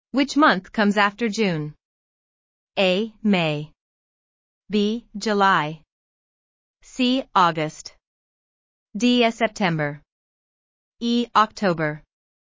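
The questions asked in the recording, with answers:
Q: Which month comes after June?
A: B: July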